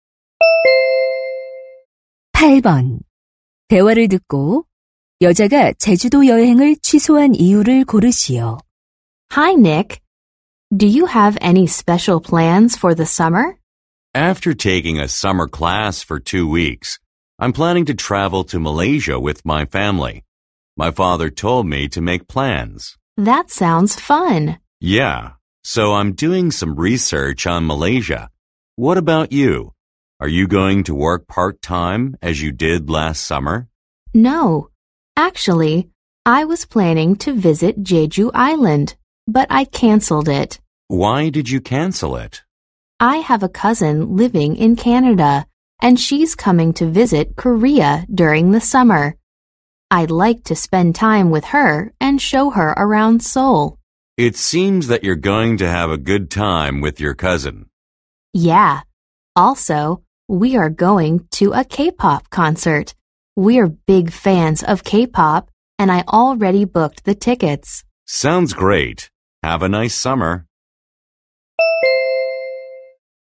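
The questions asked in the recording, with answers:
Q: 대화를 듣고 여자가 제주도 여행을 취소한 이유를 고르시오.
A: 캐나다에 사는 사촌이 한국을 방문해서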